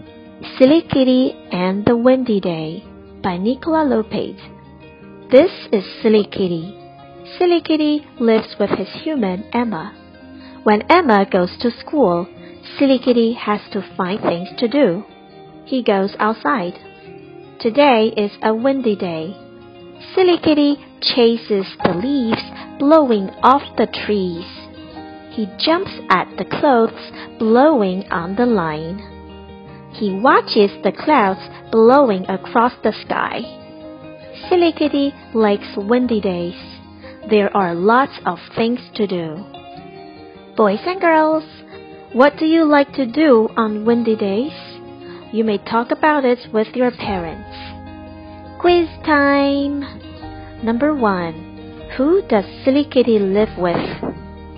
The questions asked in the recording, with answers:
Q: Who does Silly Kitty live with?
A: Emma.